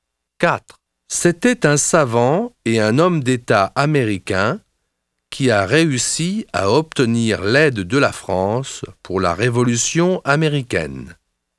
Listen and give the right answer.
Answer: C'est Benjamin Franklin. Il est du XVIIIe siècle.